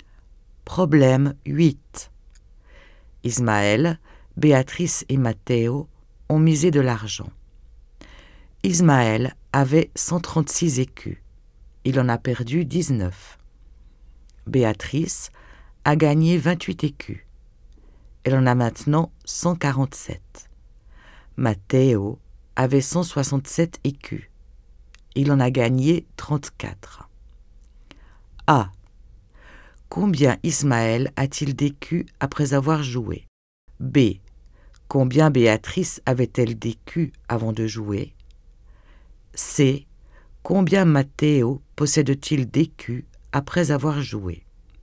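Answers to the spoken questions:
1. 117 écus
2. 119 écus
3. 201 écus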